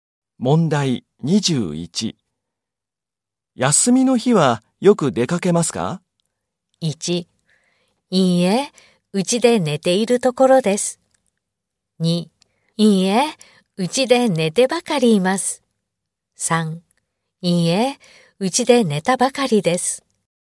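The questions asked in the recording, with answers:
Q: 休みの日はよく出かけますか?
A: 1: いいえ、うちで寝てばかりいます。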